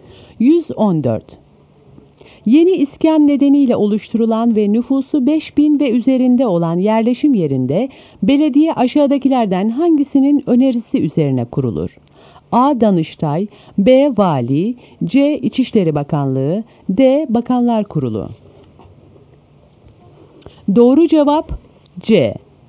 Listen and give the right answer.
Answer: Doğru cevap C.